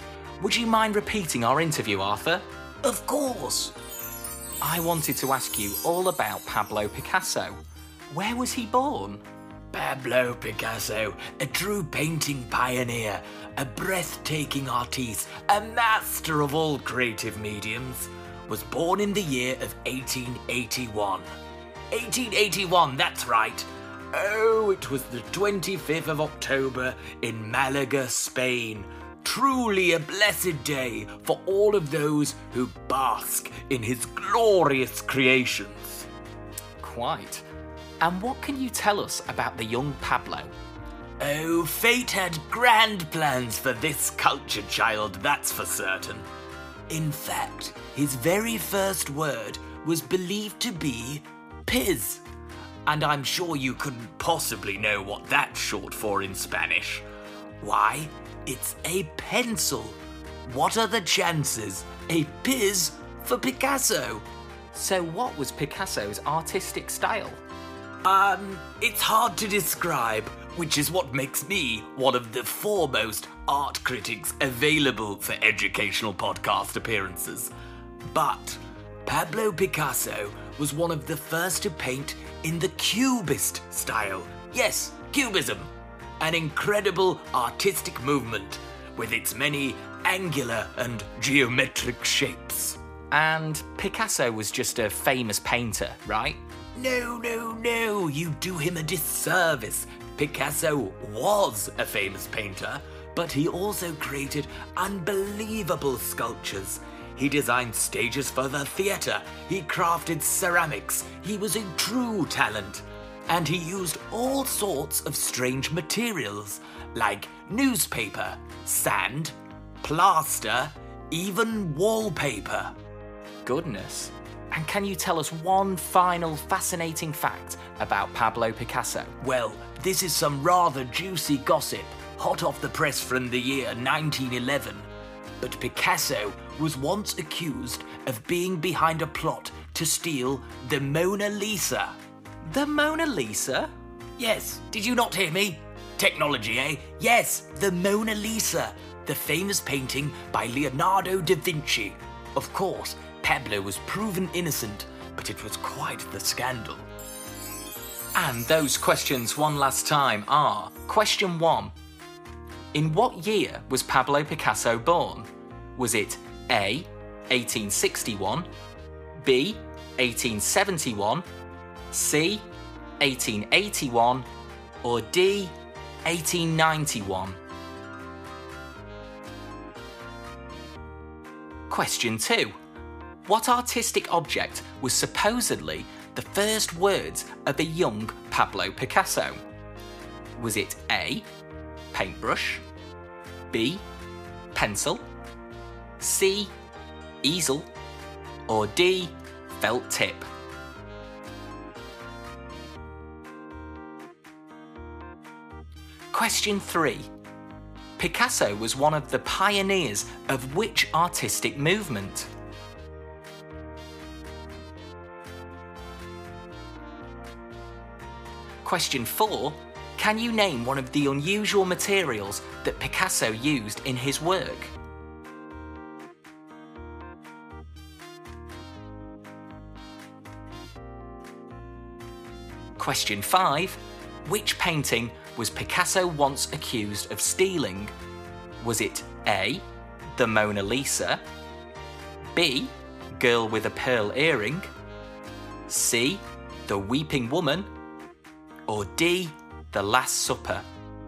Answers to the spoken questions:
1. Well, the answer was C, 1881, on the 25th of October.
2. It was Piz, which was the shortened form of the word pencil in Spanish, so the answer is B, pencil.
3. Cubism! Cubism, the 20th century artistic movement of gorgeous geometric shapes
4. They included newspaper, sand, plaster, and wallpaper.
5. But the answer was A, the Mona Lisa.